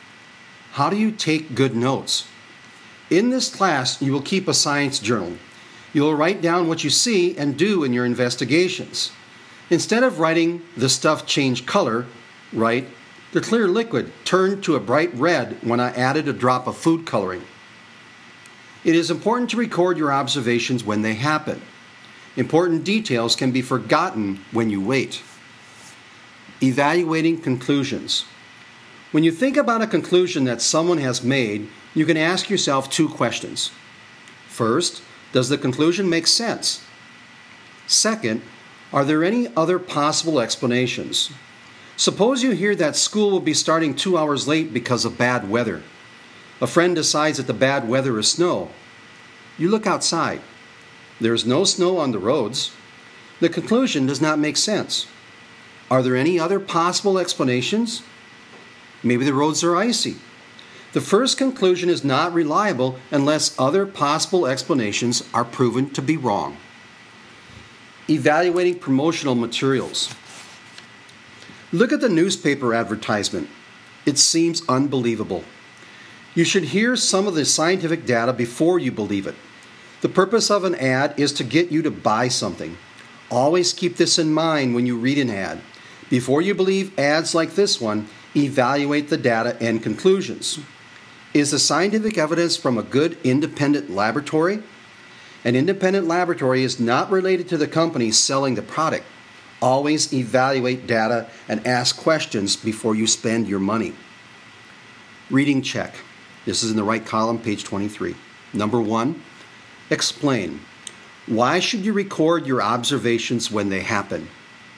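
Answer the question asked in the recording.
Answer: Because important details can be forgotten when you wait.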